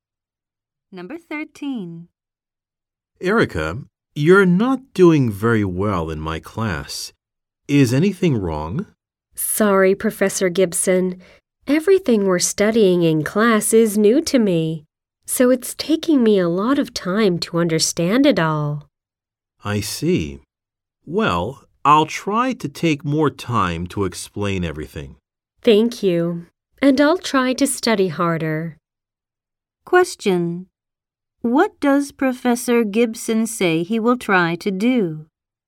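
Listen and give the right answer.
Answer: Take more time to explain everything.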